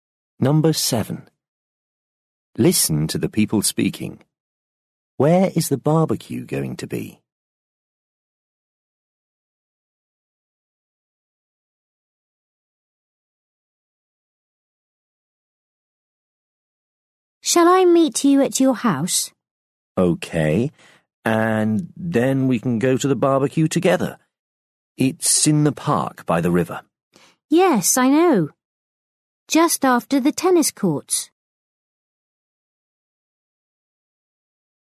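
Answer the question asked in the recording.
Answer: In the park by the river, just after the tennis courts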